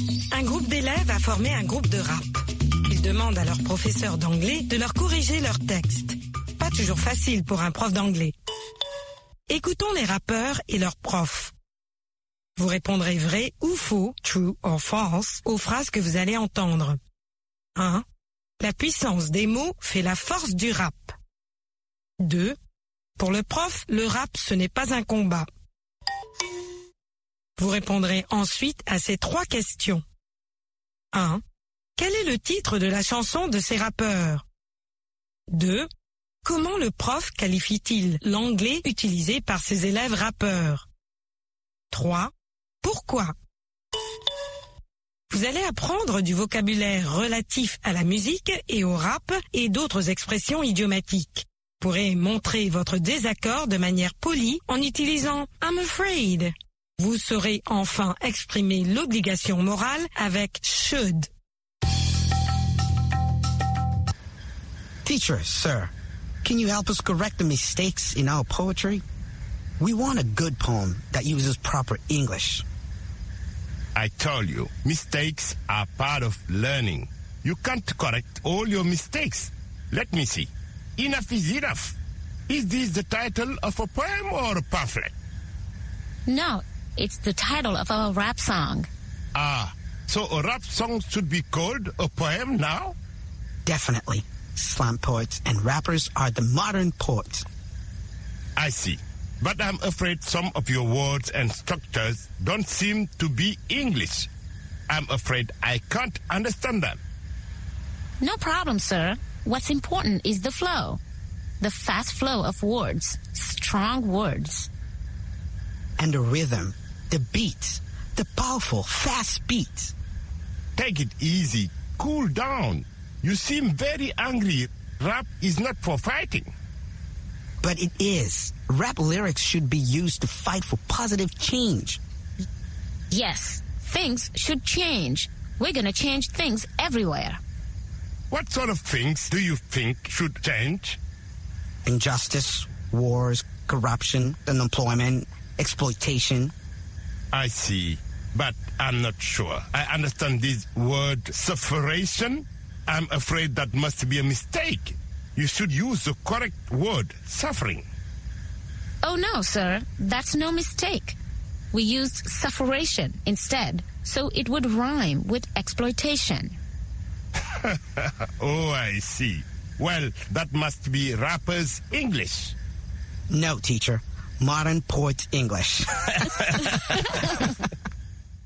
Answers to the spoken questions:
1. L'énoncé 1 est vrai.
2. L'énoncé 2 est vrai.
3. Enough is enough.
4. D'anglais de rappeur.